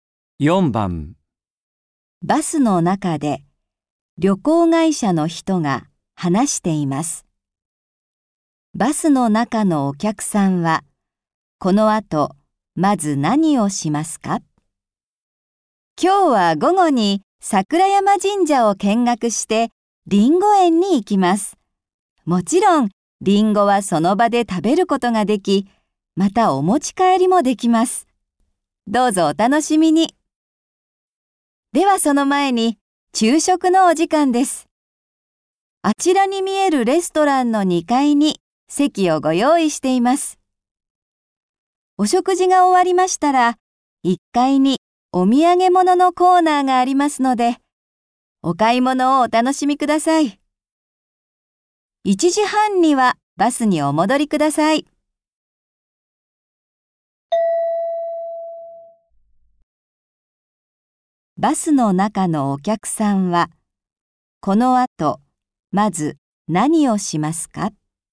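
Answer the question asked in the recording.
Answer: レストランの2階で昼食を食べる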